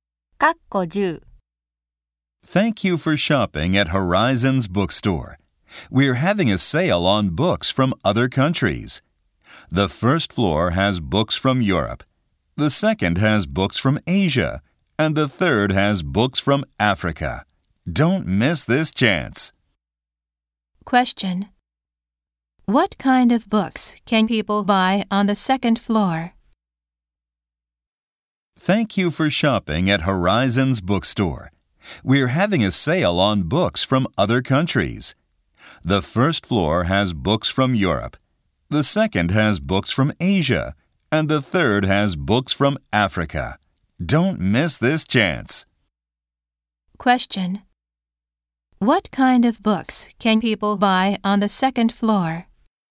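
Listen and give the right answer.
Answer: Books from Asia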